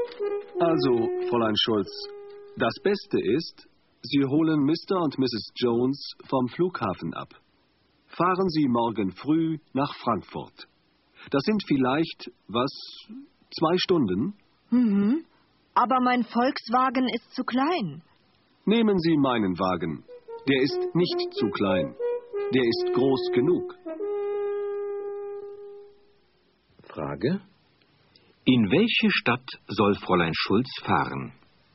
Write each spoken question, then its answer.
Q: Frage: In welche Stadt soll Fräulein Schulz fahren?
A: Sie soll nach Frankfurt fahren.